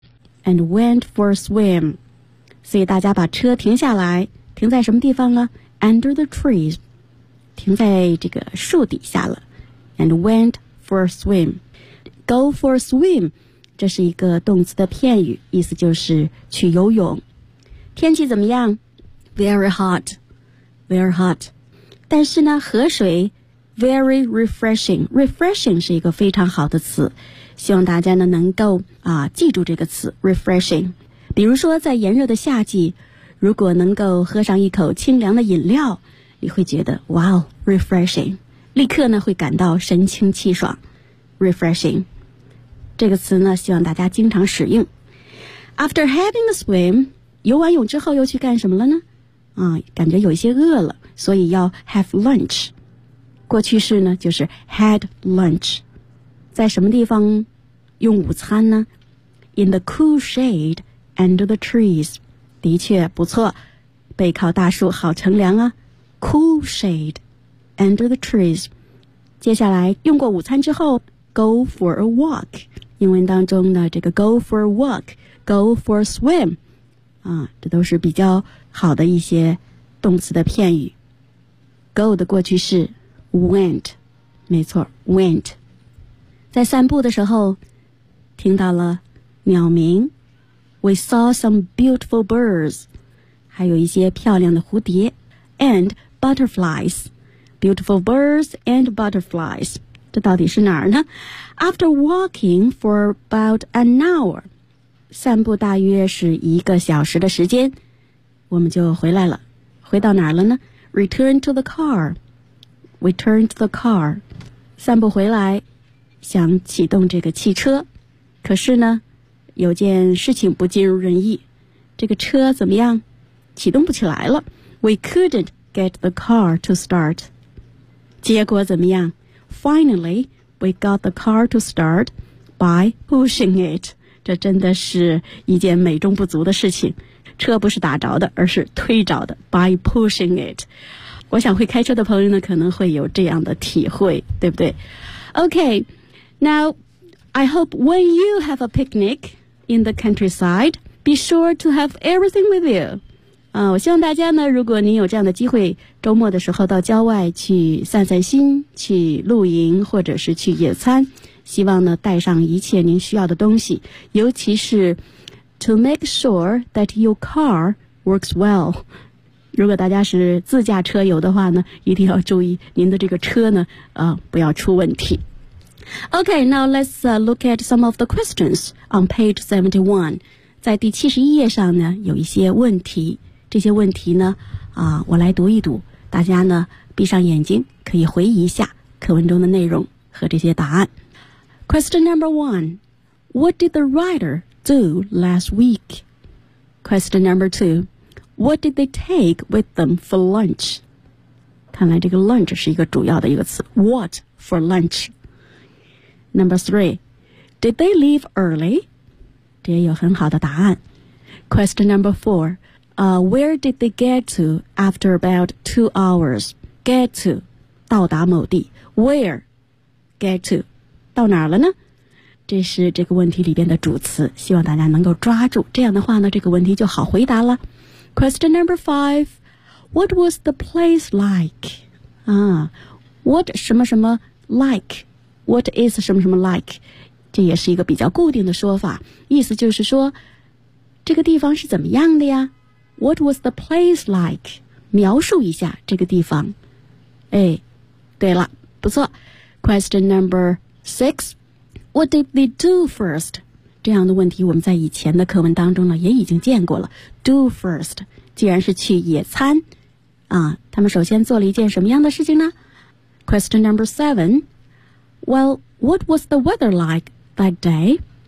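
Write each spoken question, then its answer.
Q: Well, what was the weather like that day?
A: Very hot.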